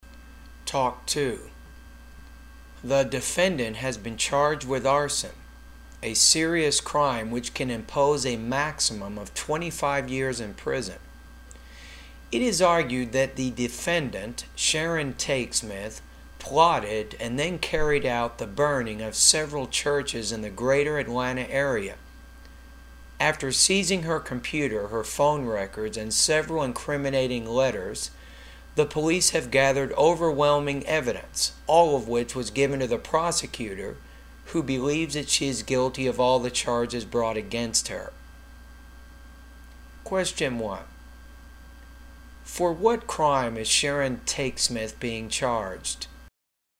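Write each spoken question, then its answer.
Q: For what crime is Sharon Tate Smith being charged?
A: Arson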